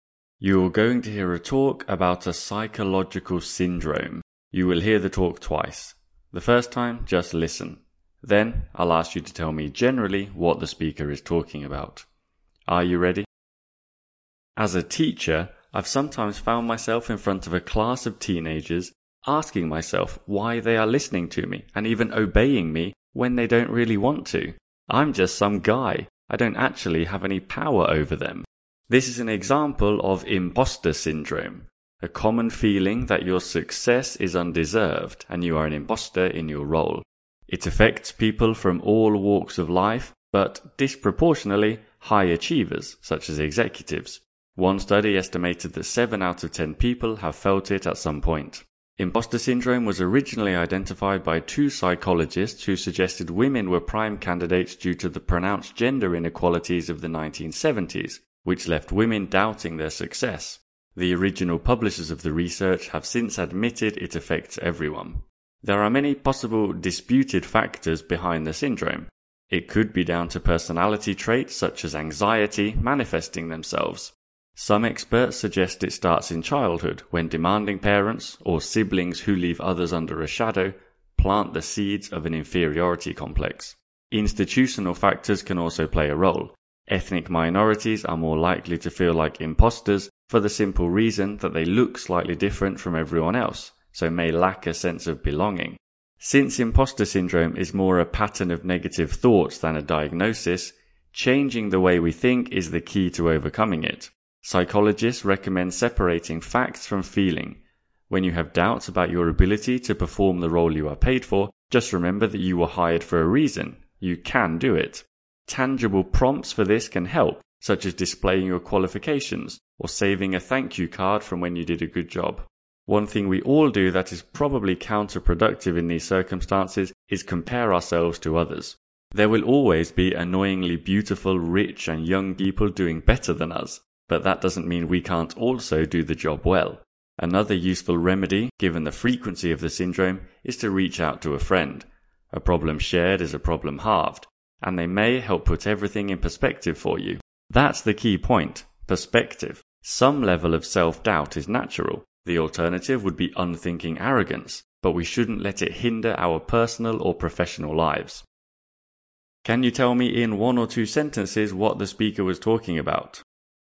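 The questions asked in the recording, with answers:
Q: Can you tell me in 1 or 2 sentences what the speaker was talking about?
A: Imposter syndrome: the common feeling that your success is undeserved, its causes, and how to overcome it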